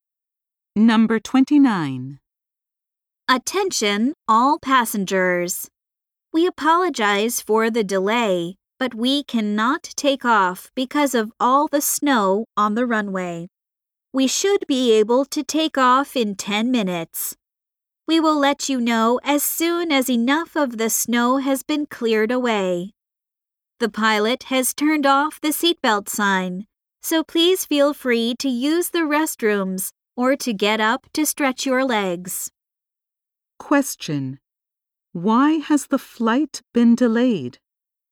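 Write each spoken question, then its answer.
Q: Why has the flight been delayed?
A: There is snow on the runway.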